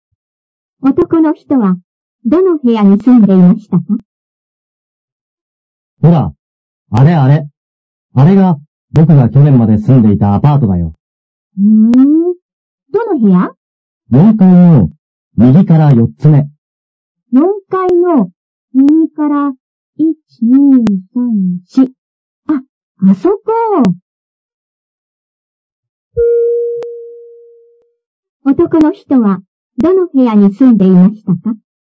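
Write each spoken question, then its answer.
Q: 男の人は、どの部屋に住んでいましたか?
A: 4階の、右から4つ目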